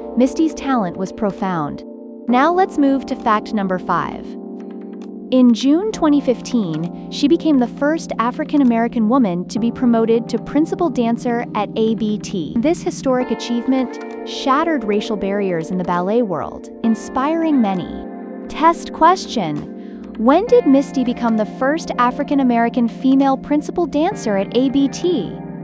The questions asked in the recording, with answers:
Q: When did Misty become the first African-American female principal dancer at ABT?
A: June 2015.